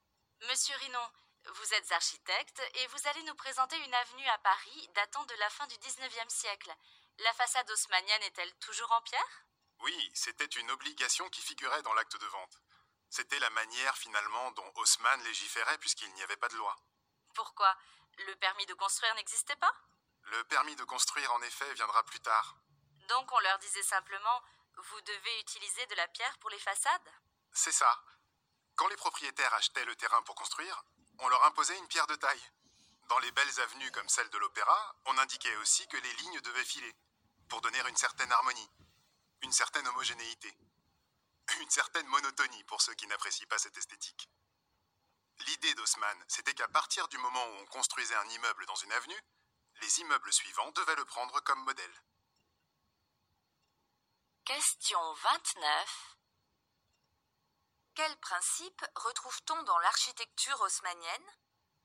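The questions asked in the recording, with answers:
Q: Quels principes retrouve-t-on dans l'architecture haussmannienne ?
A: Des façades obligatoirement en pierre de taille, des lignes qui se suivent pour donner harmonie et homogénéité, et chaque nouvel immeuble qui prend le précédent comme modèle.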